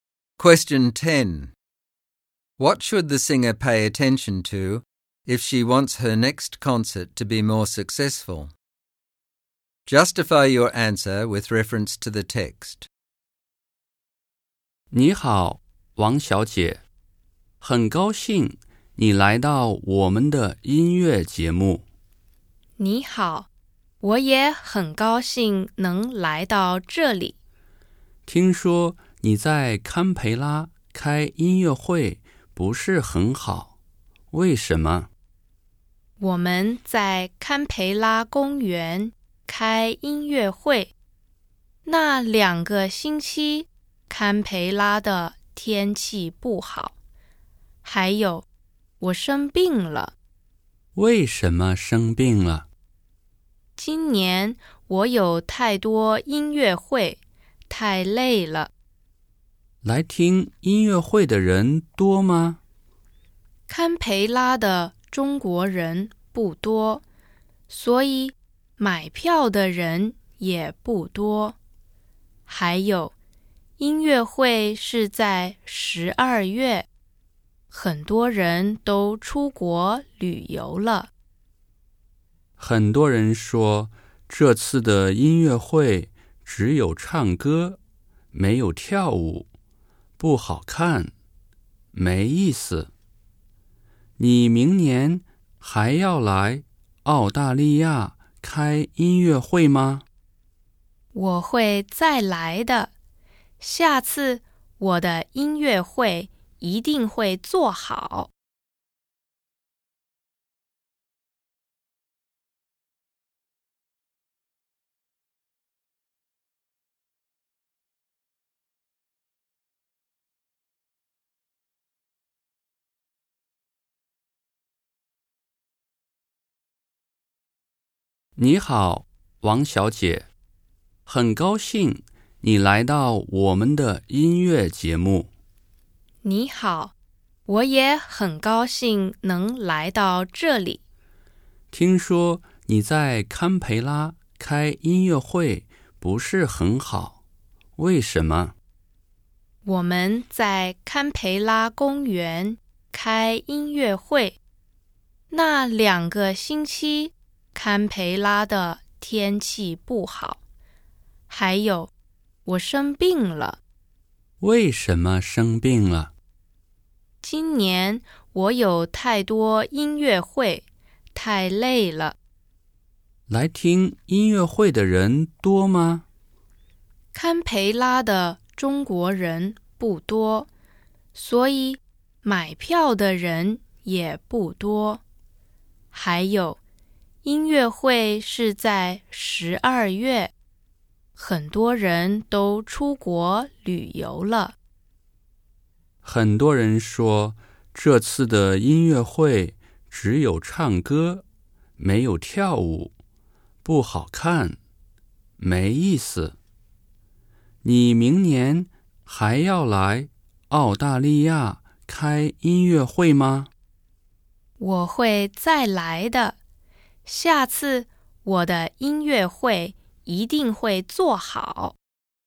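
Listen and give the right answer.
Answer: Think about the weather and the venue, don't do too many concerts so she doesn't get sick, avoid December when people are away, consider the size of the audience, and add dancing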